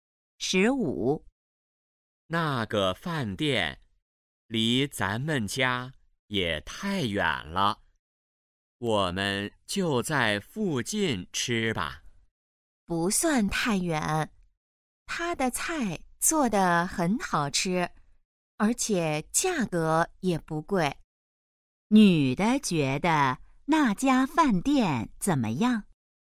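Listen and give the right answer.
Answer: 菜好吃,价格不贵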